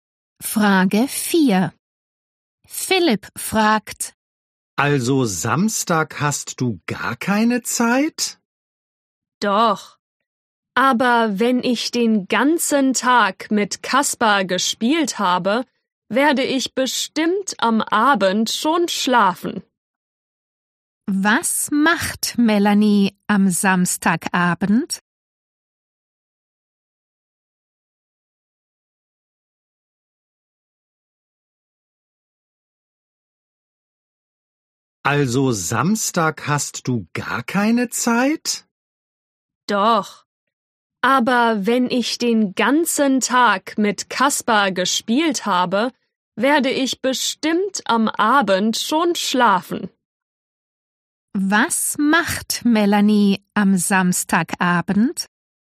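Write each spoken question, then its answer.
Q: Was macht Melanie am Samstagabend?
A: Sie schläft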